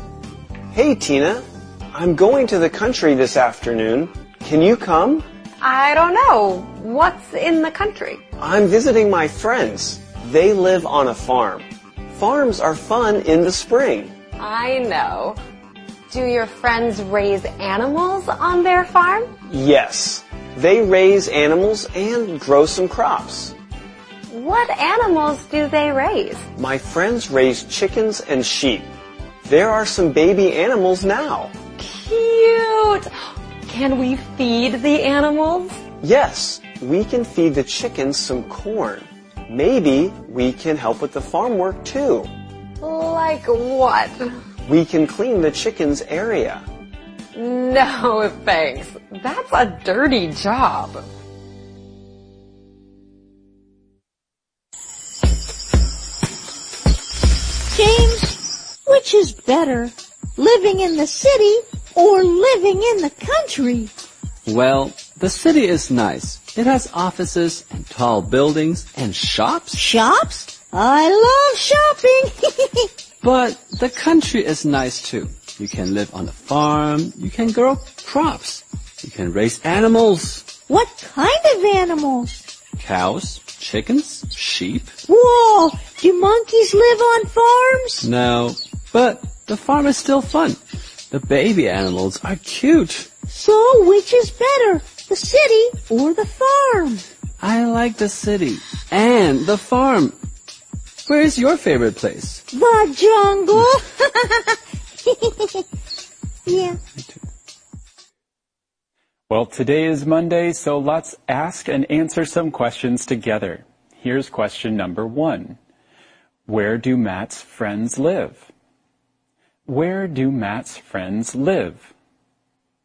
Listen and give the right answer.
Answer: They live on a farm.